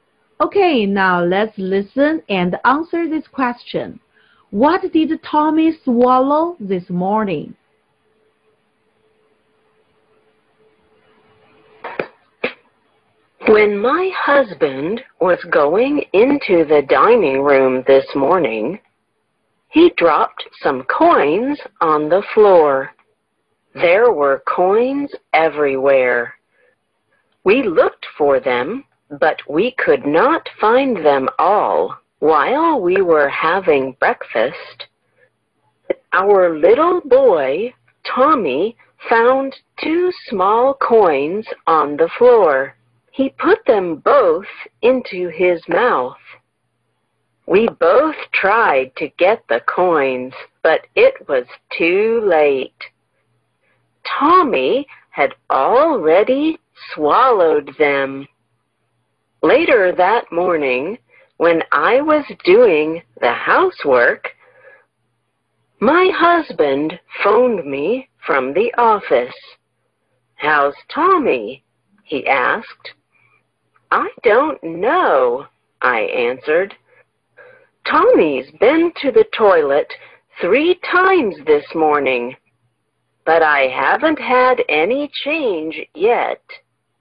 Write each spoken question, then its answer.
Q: What did Tommy swallow this morning?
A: Tommy swallowed 2 coins.